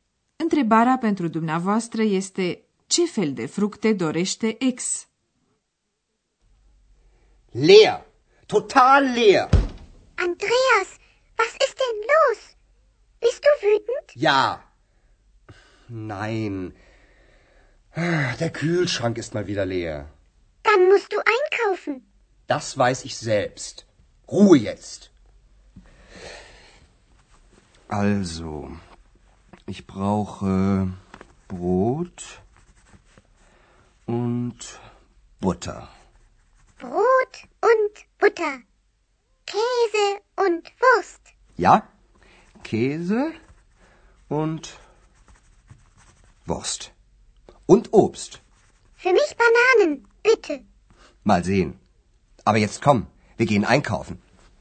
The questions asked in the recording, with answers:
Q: Întrebarea pentru dumneavoastră este ce fel de fructe dorește ex?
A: Așadar, ex dorește banane.